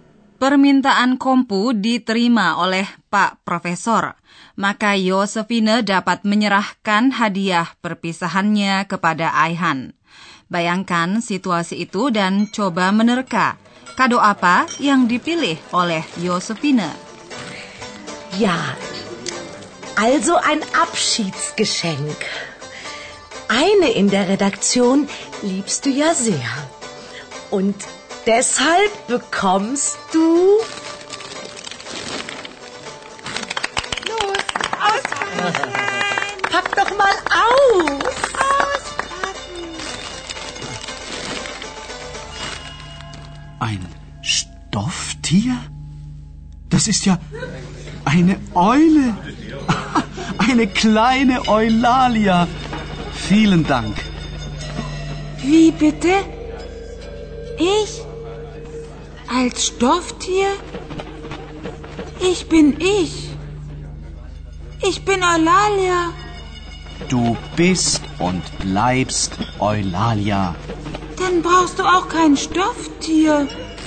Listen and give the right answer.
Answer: Kiranya Anda dapat menangkap bahwa hadiah itu berupa burung hantu.